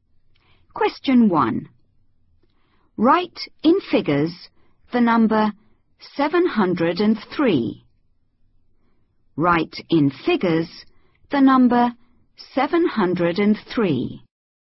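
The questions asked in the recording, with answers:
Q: Write in figures the number 703.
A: 703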